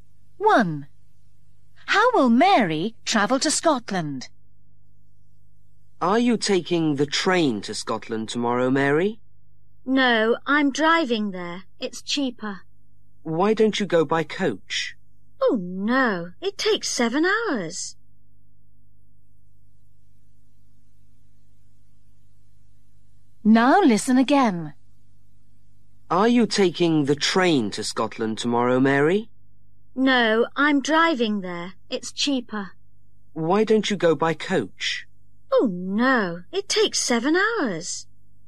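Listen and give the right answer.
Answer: By car (driving)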